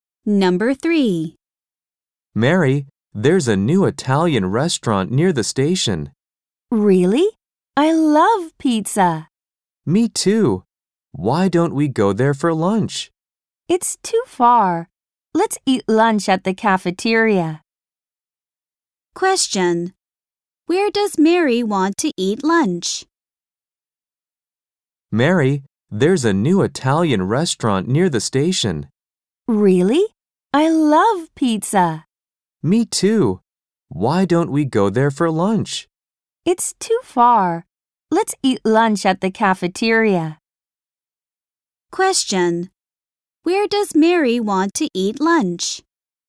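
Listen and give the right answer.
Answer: At the cafeteria.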